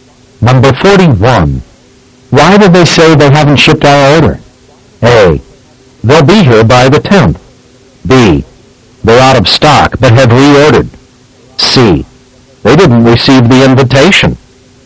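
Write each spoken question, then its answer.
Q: Why did they say they haven't shipped our order?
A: B: They're out of stock but have reordered.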